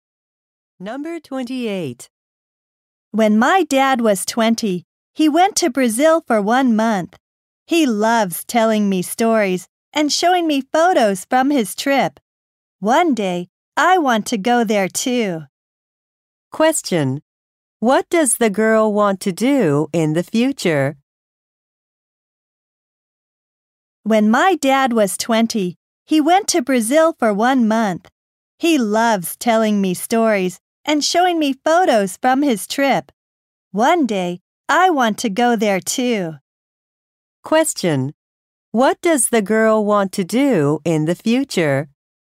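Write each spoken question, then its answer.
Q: What does the girl want to do in the future?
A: Go to Brazil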